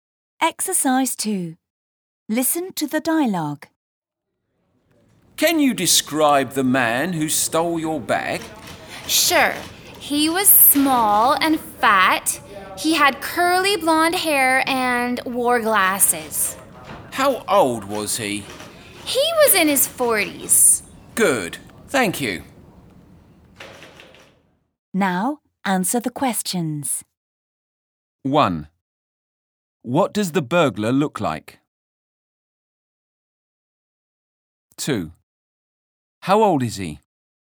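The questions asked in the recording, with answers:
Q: What does the burglar look like?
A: He is small and fat, with curly blonde hair and glasses.

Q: How old is he?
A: He is in his 40s.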